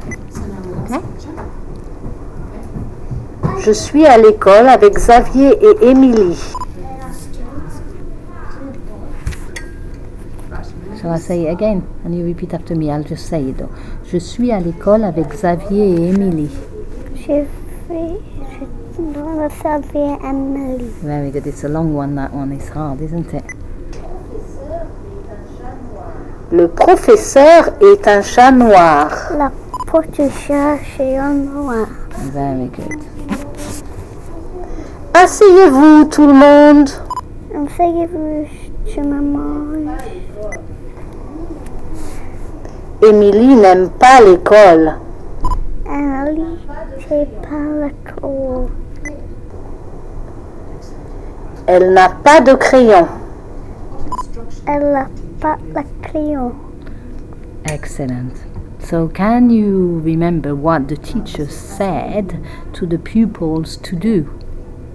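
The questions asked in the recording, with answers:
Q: So can you remember what the teacher said to the pupils to do?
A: Sit down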